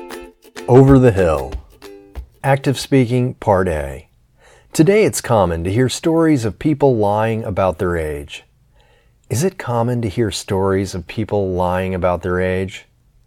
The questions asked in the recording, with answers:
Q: Is it common to hear stories of people lying about their age?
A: Yes, today it's common to hear stories of people lying about their age.